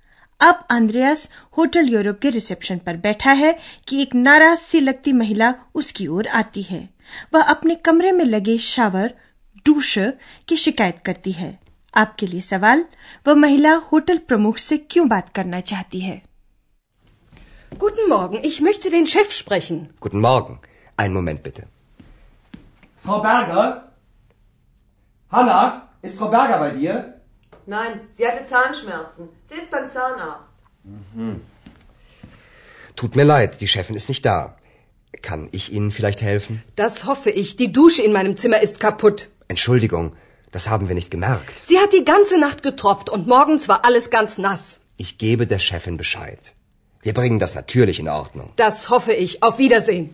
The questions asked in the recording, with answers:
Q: वह महिला hotel प्रमुख से क्यों बात करना चाहती है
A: वह महिला hotel प्रमुख से इसलिए बात करना चाहती है कि उसके कमरे का shower टूटा हुआ है